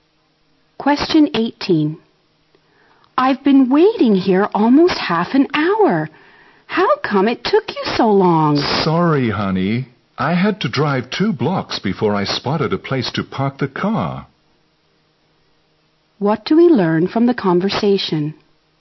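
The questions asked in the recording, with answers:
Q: What do we learn from the conversation?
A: The man was late because it took him a long time to find a parking space.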